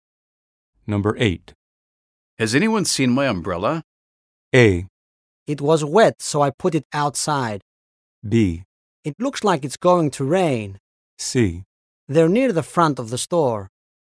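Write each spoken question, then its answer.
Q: Has anyone seen my umbrella?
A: A: It was wet, so I put it outside.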